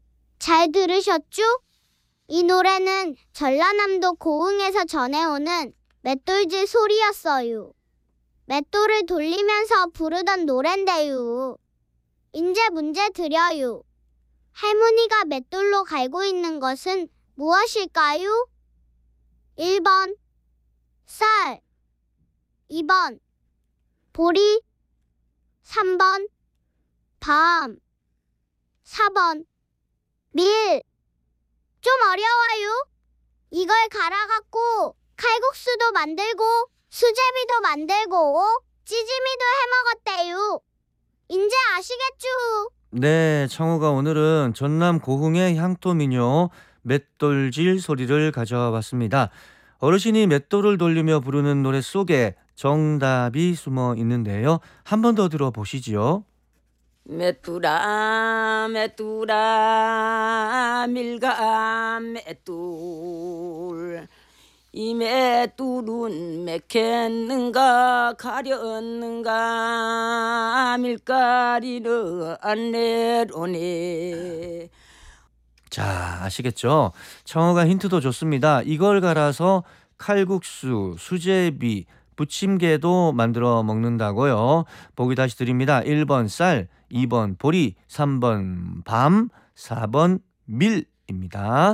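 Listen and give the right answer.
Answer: 4: 밀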